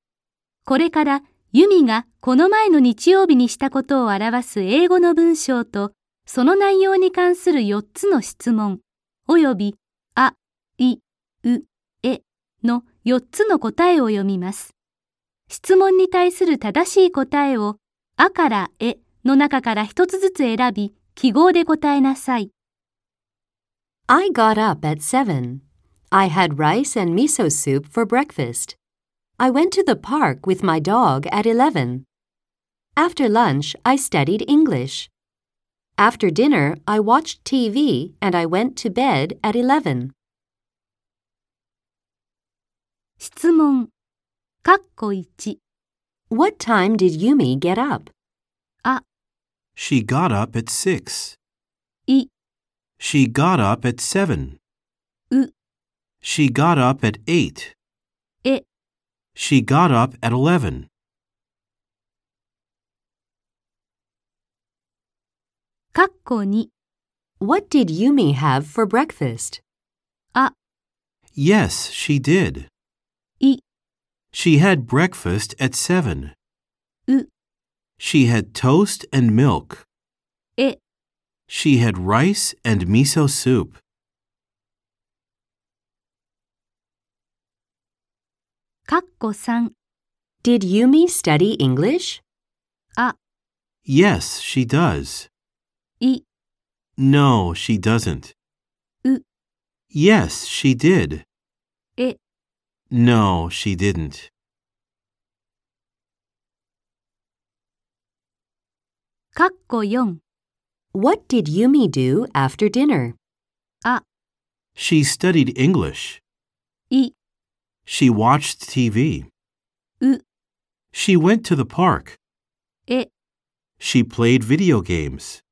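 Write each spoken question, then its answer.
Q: What time did Yumi get up?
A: い: She got up at 7.

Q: What did Yumi have for breakfast?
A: え: She had rice and miso soup.

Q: Did Yumi study English?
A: う: Yes, she did.

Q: What did Yumi do after dinner?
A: い: She watched TV.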